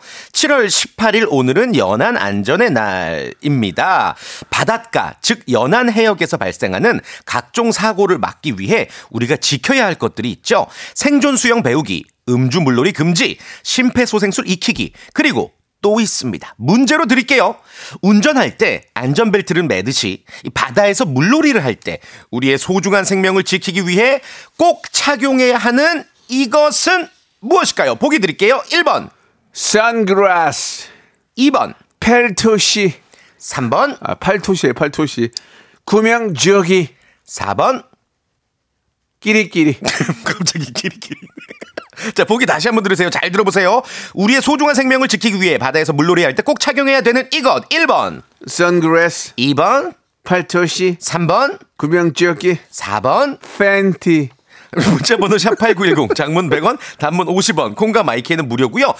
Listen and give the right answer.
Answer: 바로 정답은 3번 구명조끼였고요.